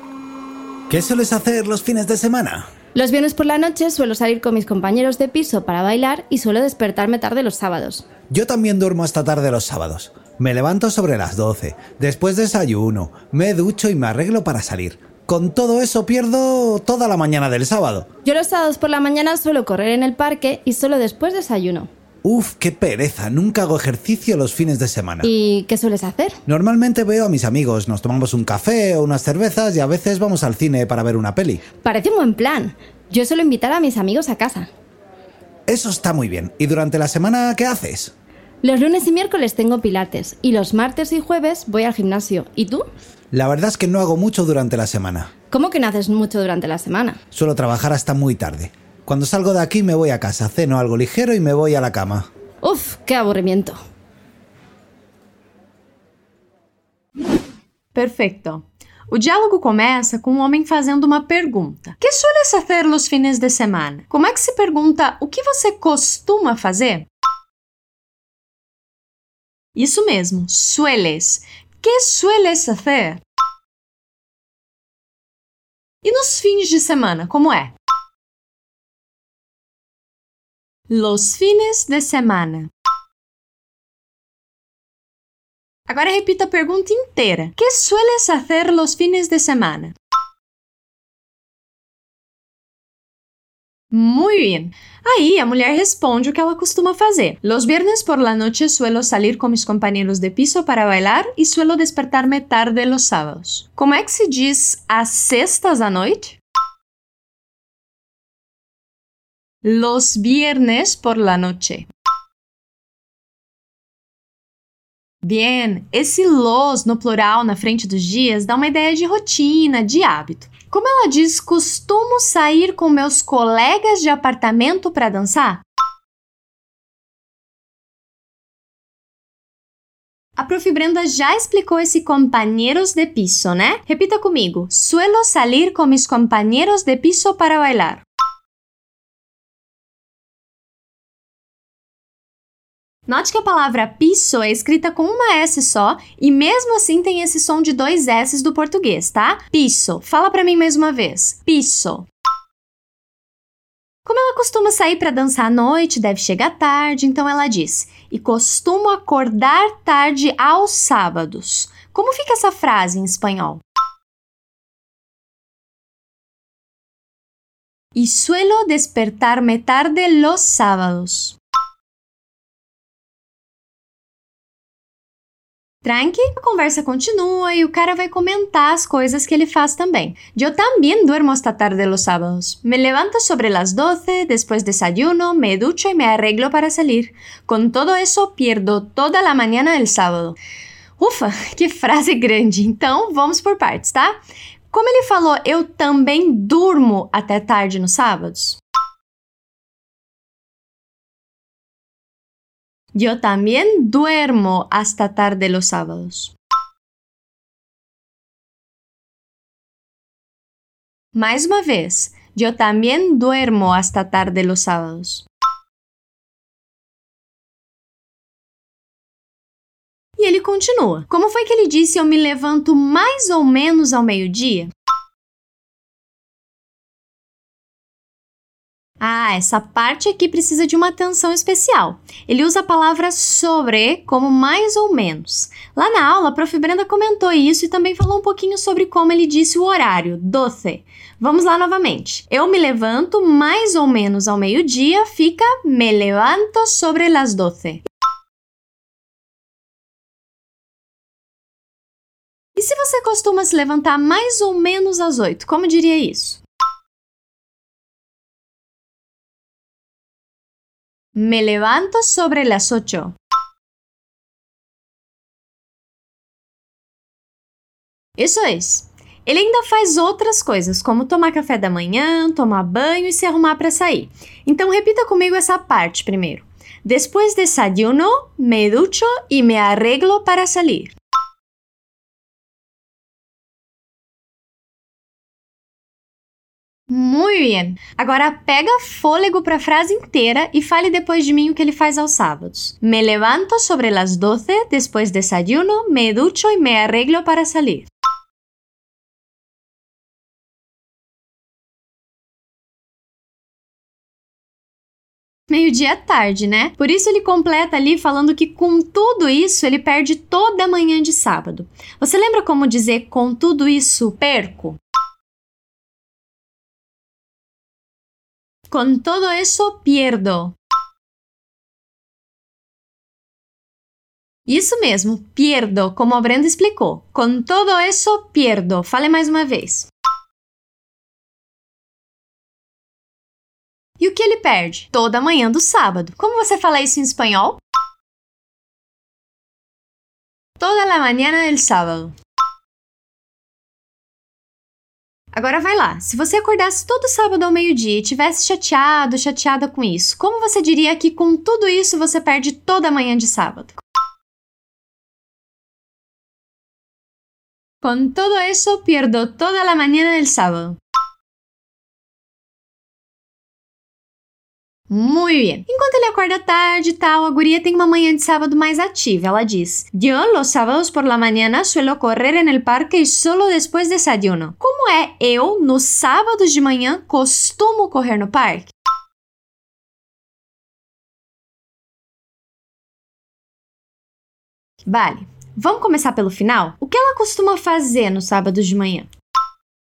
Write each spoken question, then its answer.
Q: O que ela costuma fazer nos sábados de manhã?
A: Correr en el parque.